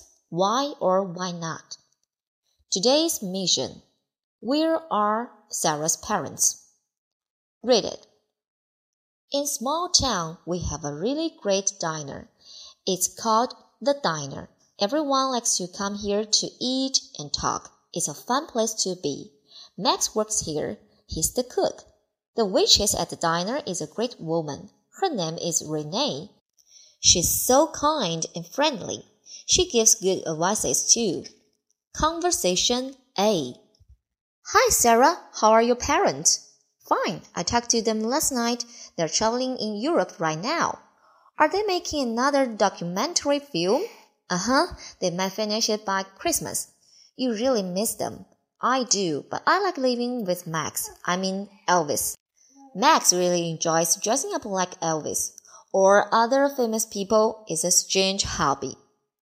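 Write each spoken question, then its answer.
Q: Where are Sarah's parents?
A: Traveling in Europe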